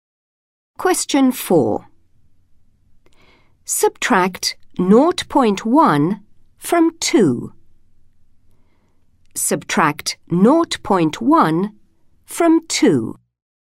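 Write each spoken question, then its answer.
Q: Subtract 0.1 from 2.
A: 1.9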